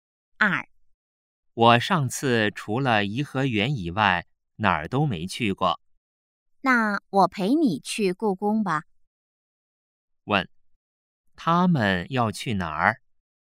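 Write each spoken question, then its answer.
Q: 他们要去哪儿?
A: 故宫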